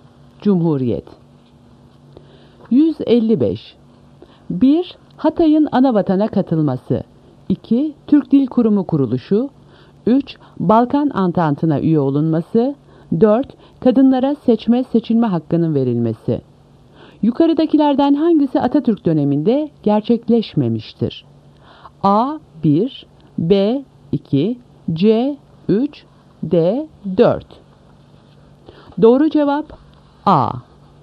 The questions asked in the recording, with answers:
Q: Yukarıdakilerden hangisi Atatürk döneminde gerçekleşmemiştir?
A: Doğru cevap A. 1.